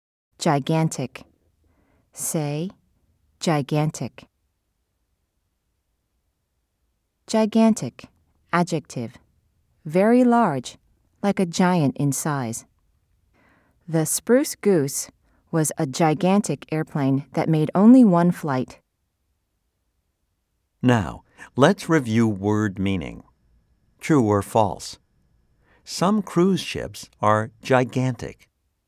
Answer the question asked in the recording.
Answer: If you said true, you are right.